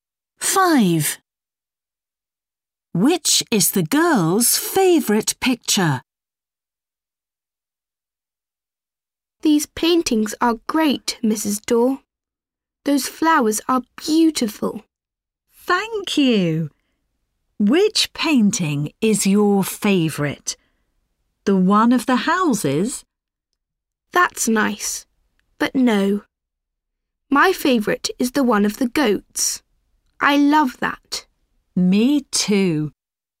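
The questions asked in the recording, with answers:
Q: Which is the girl's favourite picture?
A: The one of the goats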